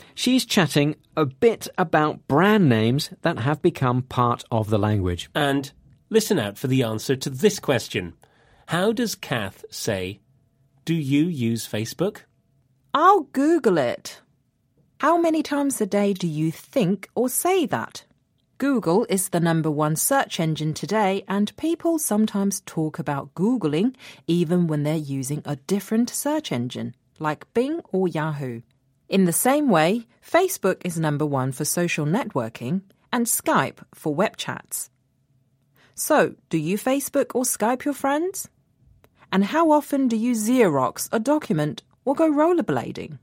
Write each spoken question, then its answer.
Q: How does Kath say, do you use Facebook?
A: she said, do you Facebook your friends?